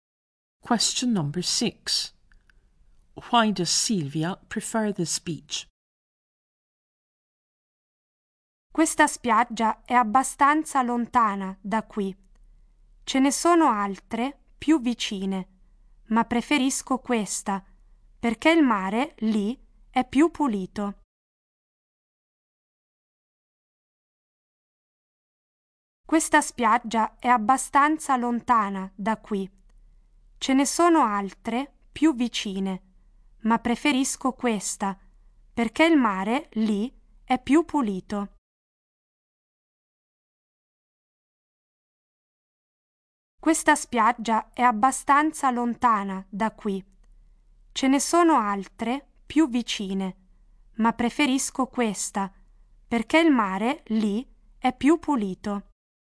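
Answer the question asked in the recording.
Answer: The sea there is cleaner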